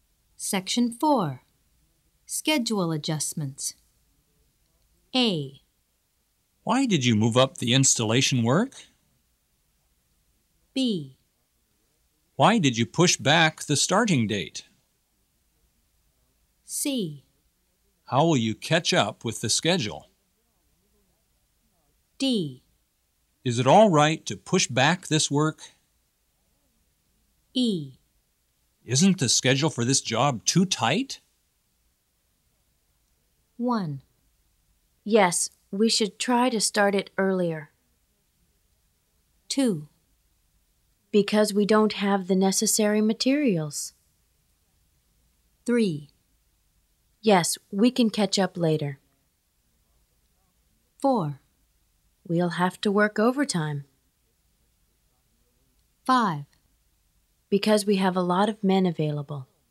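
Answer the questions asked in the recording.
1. 5: Because we have a lot of men available.
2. 2: Because we don't have the necessary materials.
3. 4: We'll have to work overtime.
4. 3: Yes, we can catch up later.
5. 1: Yes, we should try to start it earlier.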